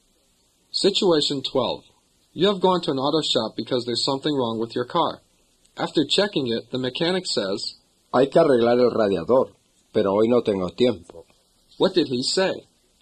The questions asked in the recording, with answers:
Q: What did he say?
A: He said, it is necessary to fix the radiator, but I don't have time today.